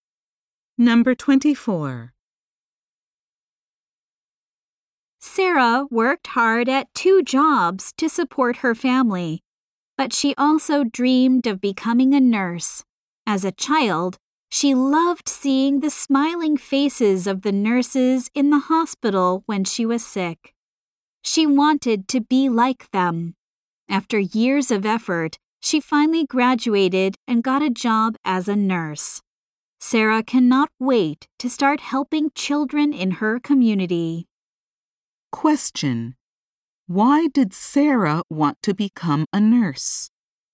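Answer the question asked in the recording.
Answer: She admired the smiling nurses when she was sick as a child.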